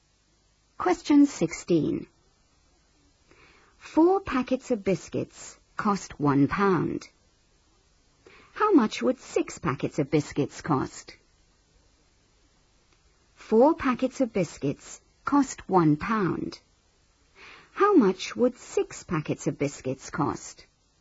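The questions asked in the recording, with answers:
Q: How much would 6 packets of biscuits cost?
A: £1.50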